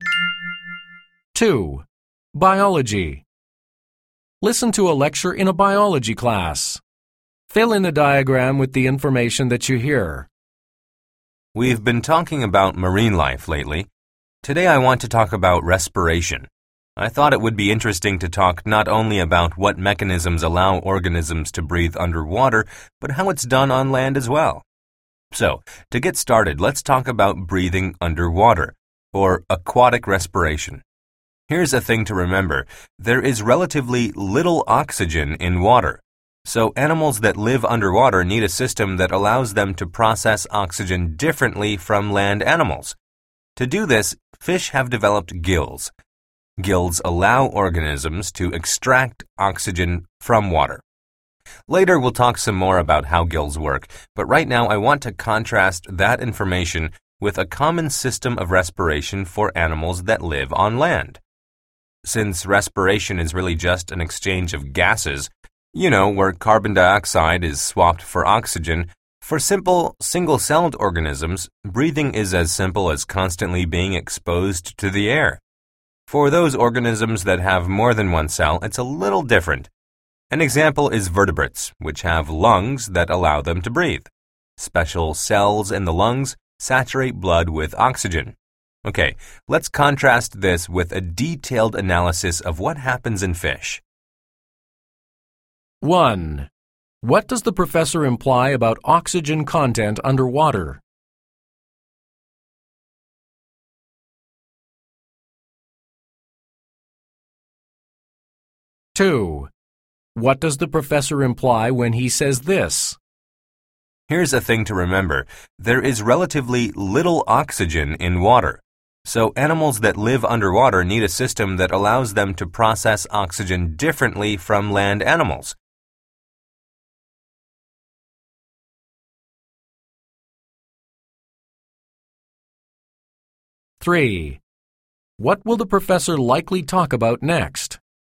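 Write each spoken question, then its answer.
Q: What does the professor imply about oxygen content underwater?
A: There is relatively little oxygen in water, so underwater animals need a different way to process it

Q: What will the professor likely talk about next?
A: How respiration works in fish, in detail (how gills work)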